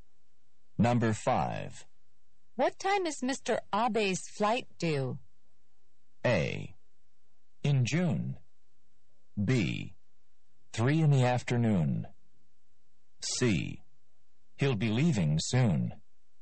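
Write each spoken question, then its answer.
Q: What time is Mr. Abe's flight due?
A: B: 3 in the afternoon.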